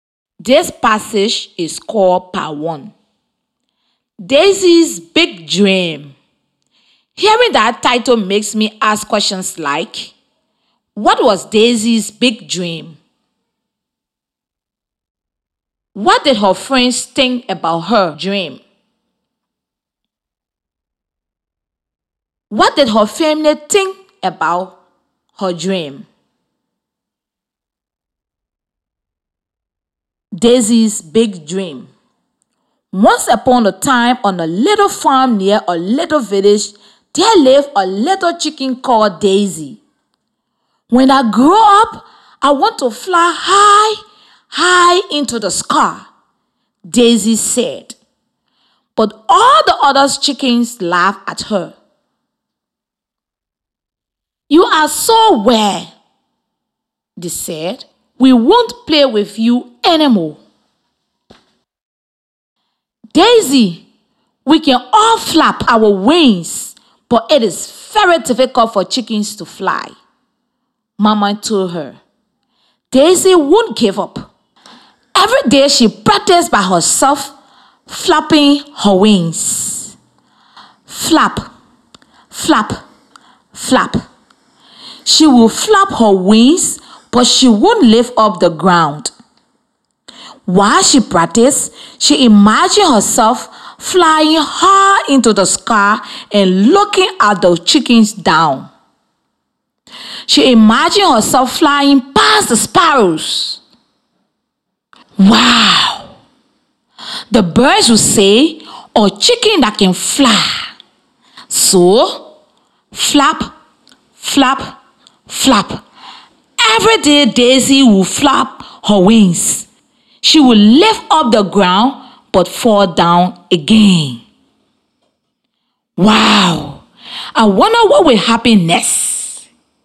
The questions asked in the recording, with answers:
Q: what was Daisy's big dream?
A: So, Daisy's dream was to fly high, high into the sky when she grows up.

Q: What did her friends think about her dream?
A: Her friends thought she was weird, so they decided not to play with her anymore.

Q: What did her family think about her dream?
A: Daisy's family thought this was a difficult thing for her.